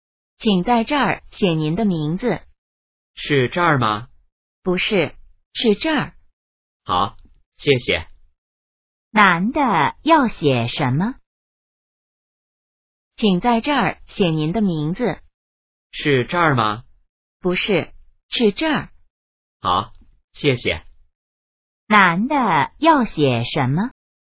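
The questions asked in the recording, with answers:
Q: 男的要写什么?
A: 名字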